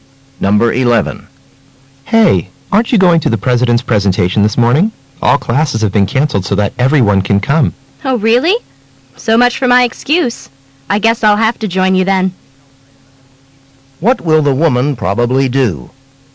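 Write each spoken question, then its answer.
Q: What will the woman probably do?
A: Go to the president's presentation.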